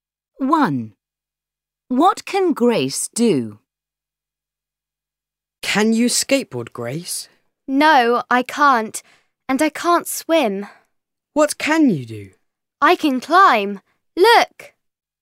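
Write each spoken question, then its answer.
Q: What can Grace do?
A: climb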